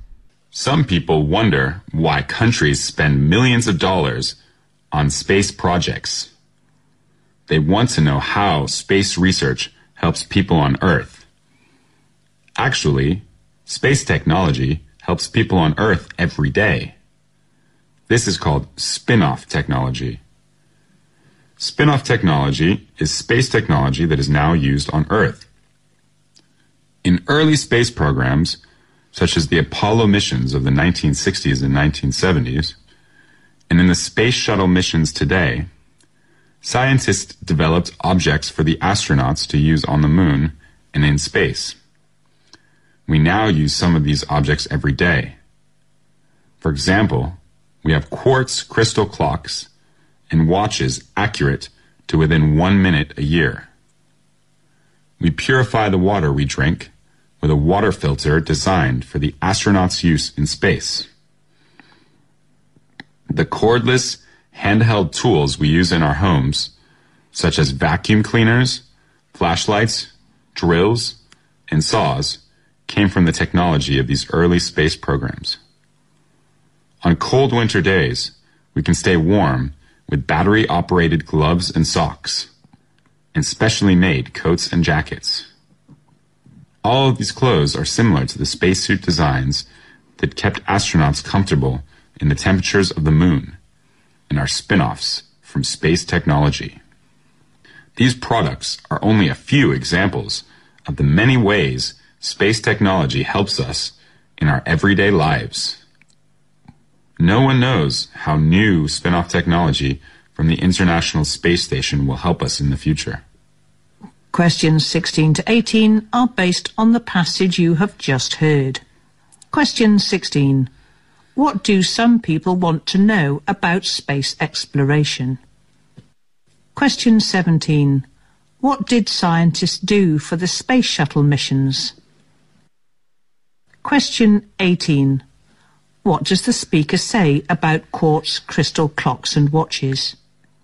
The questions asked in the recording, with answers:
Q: What do some people want to know about space exploration?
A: they want to know how space research may help people on the Earth.

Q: What did scientists do for the space shuttle missions?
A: Of course, they design a lot of things used by those astronauts.

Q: What does the speaker say about quartz crystal clocks and watches?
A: These clocks and watches are very accurate, accurate to 1 minute in 1 year.